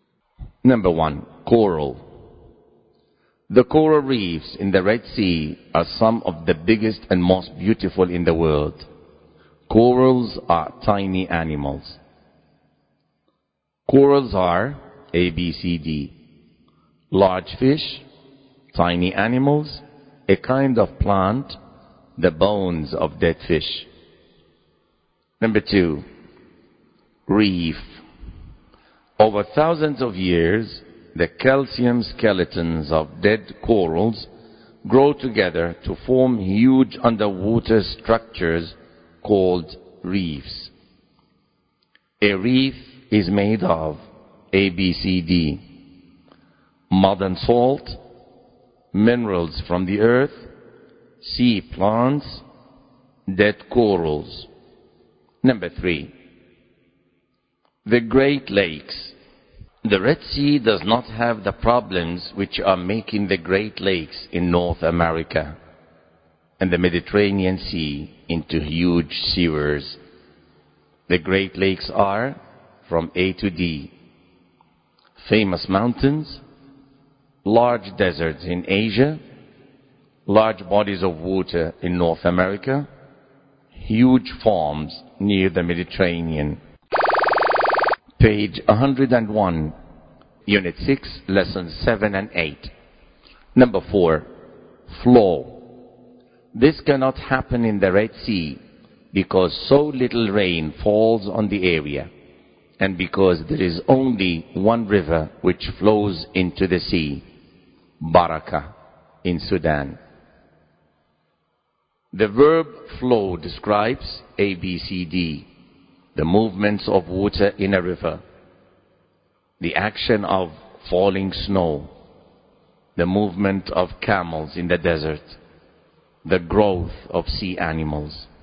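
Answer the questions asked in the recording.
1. B: tiny animals
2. D: dead corals
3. C: large bodies of water in North America
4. A: the movements of water in a river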